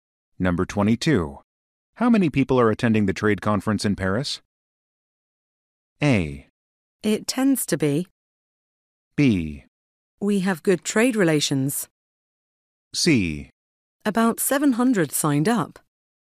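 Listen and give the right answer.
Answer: C: About 700 signed up.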